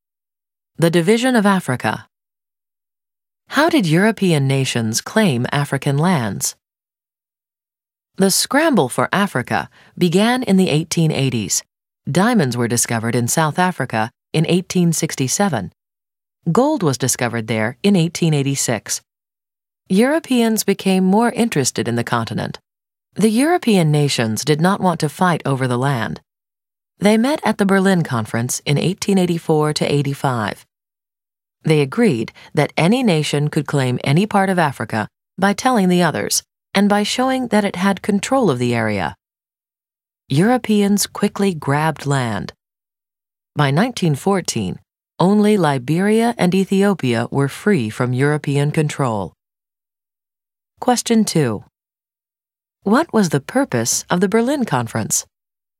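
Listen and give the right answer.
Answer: To agree on rules for claiming African land without fighting each other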